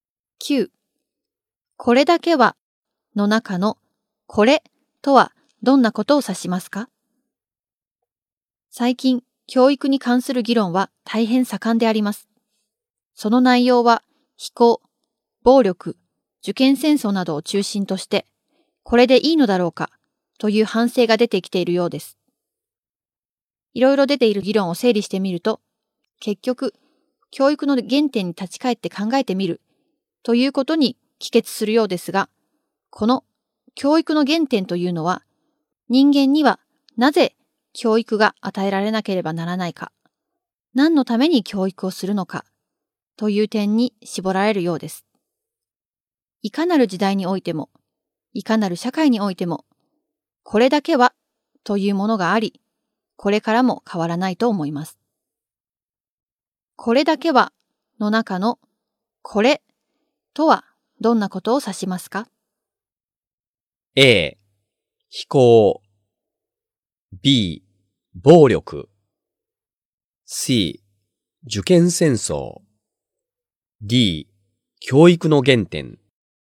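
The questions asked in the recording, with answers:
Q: これだけはの中のこれとはどんなことを指しますか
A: D: 教育の原点。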